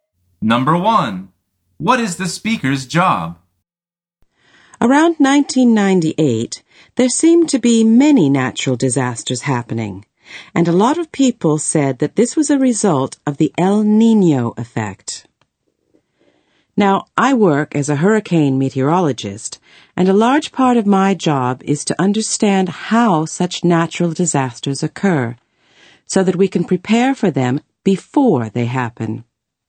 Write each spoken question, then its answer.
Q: What is the speaker's job?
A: The answer is a hurricane meteorologist.